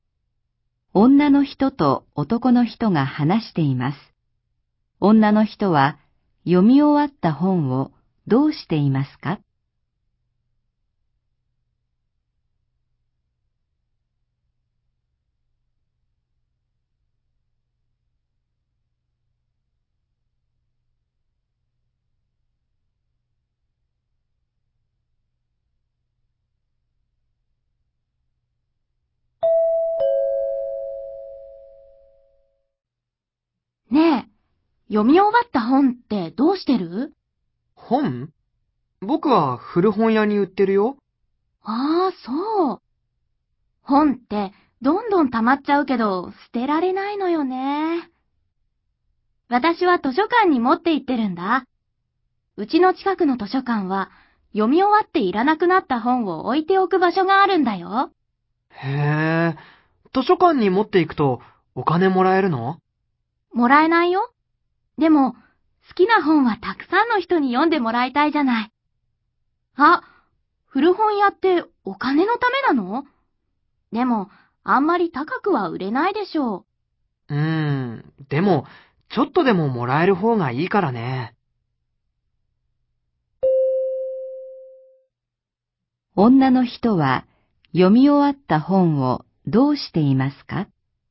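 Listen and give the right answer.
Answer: 図書館に持って行っている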